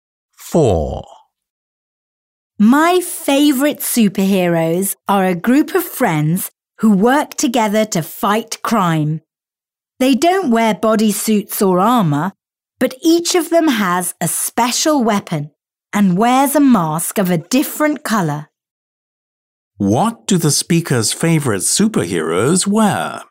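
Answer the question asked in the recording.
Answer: Masks of different colors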